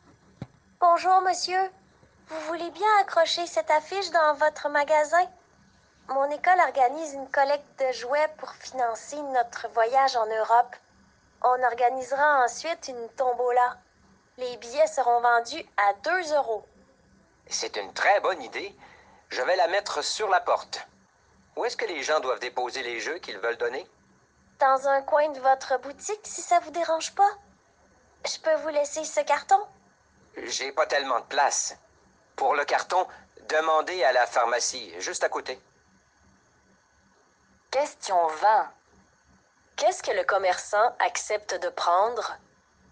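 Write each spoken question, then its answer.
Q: Qu'est-ce que le commerçant accepte de prendre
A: L'affiche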